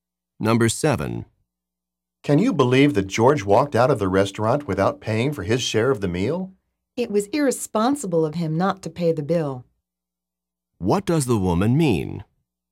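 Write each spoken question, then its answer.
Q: What does the woman mean?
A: George was irresponsible for not paying.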